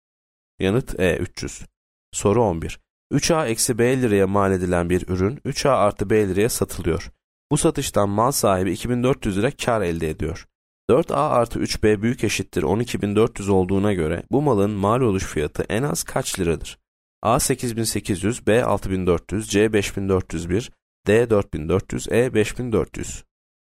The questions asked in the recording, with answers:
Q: 4A artı 3B büyük eşittir 12.400 olduğuna göre bu malın mal oluş fiyatı en az kaç liradır?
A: E 5.400.